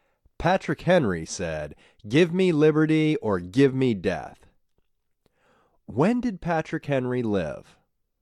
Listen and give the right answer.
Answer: Patrick Henry lived over 200 years ago.